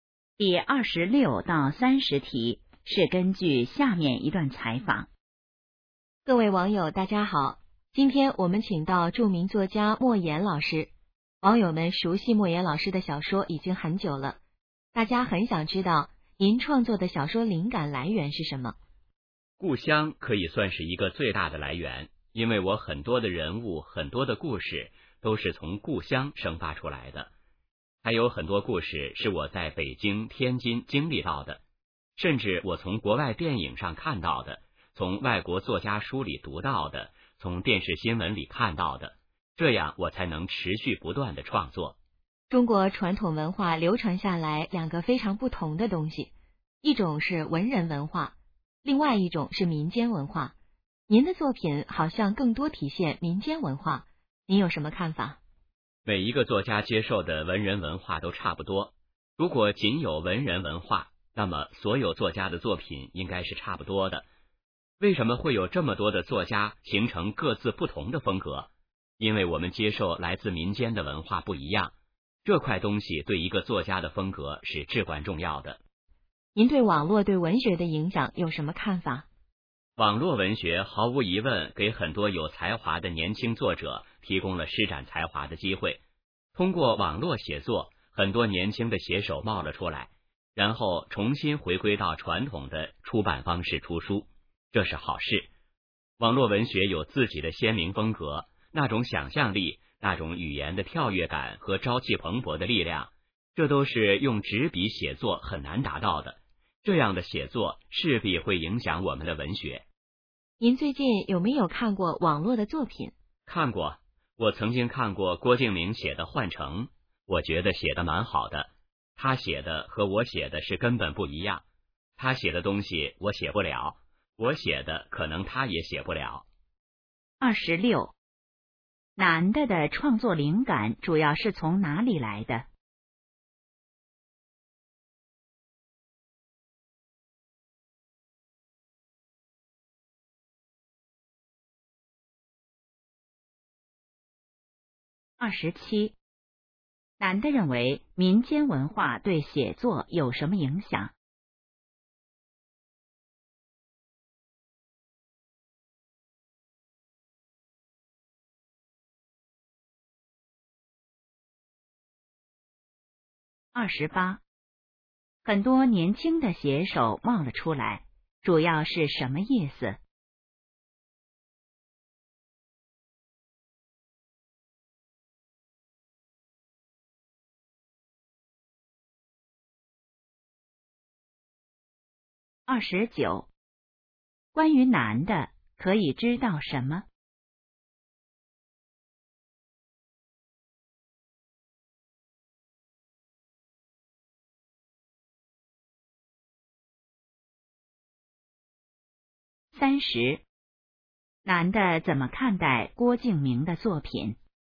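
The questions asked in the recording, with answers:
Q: 男的的创作灵感主要是从哪里来的?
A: 故乡

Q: 男的认为民间文化对写作有什么影响?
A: 对作家的风格至关重要

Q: 很多年轻的写手冒了出来,主要是什么意思?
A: 很多年轻写手出现了

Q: 男的怎么看待郭敬明的作品?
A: 写得蛮好,和自己写的根本不一样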